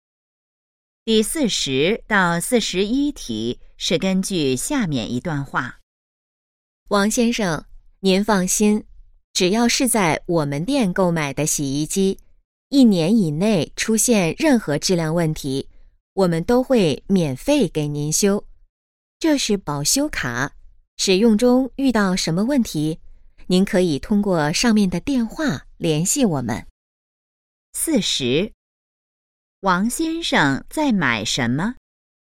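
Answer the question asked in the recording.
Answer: 洗衣机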